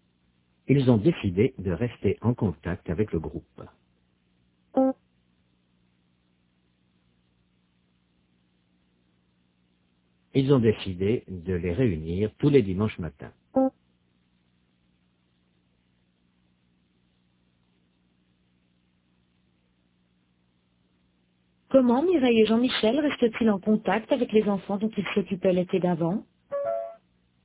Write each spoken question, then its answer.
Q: Comment Mireille et Jean-Michel restent-ils en contact avec les enfants dont ils s'occupaient l'été d'avant?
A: Ils les réunissent tous les dimanches matins.